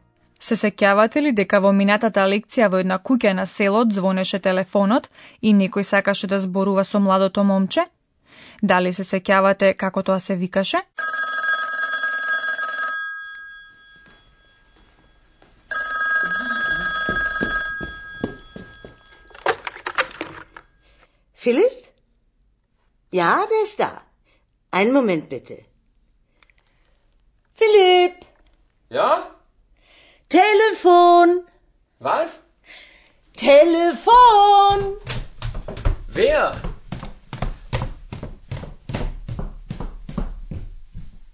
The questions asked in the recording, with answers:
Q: Дали се сеќавате како тоа се викаше?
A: Значи тоа беше момчето што се вика Филип.